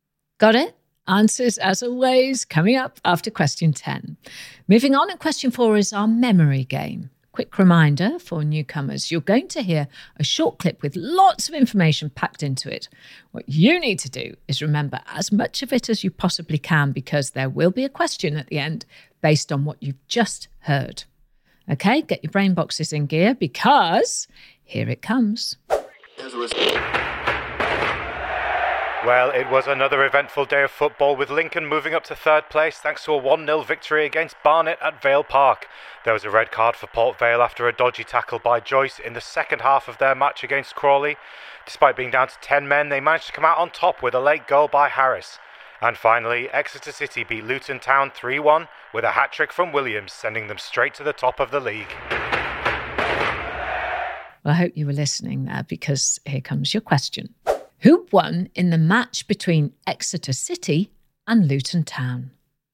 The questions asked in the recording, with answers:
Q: Who won in the match between Exeter City and Luton Town?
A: Well, it was a 3-1 win to Exeter City.